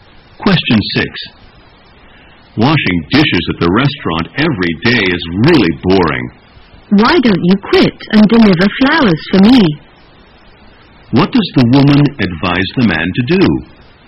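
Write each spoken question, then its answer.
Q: What does the woman advise the man to do?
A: Quit his dishwashing job and deliver flowers for her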